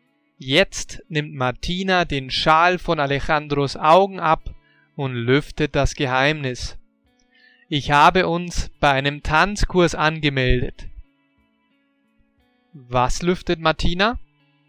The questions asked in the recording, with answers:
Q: Was lüftet Martina?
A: Das Geheimnis.